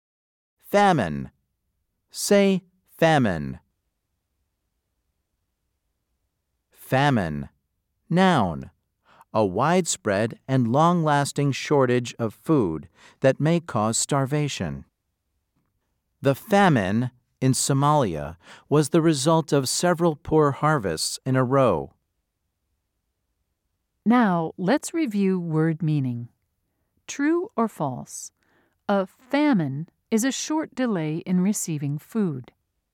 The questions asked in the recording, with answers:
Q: True or false? A famine is a short delay in receiving food.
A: If you said false, you were correct.